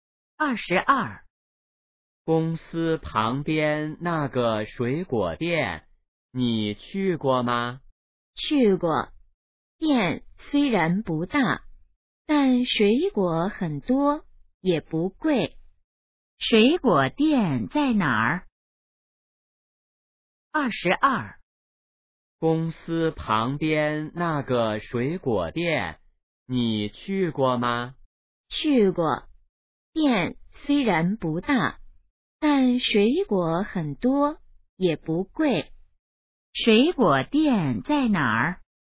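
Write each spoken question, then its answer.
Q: 水果店在哪儿?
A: 公司旁边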